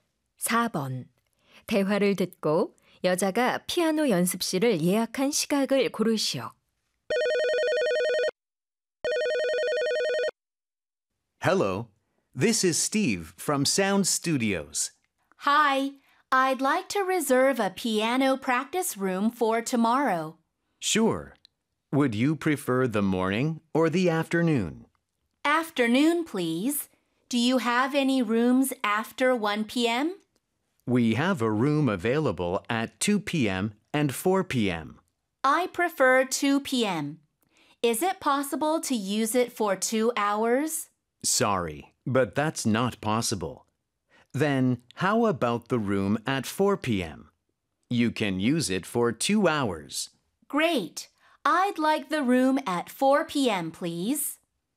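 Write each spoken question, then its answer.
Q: 대화를 듣고 여자가 피아노 연습실을 예약한 시각을 고르시오.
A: 오후 4시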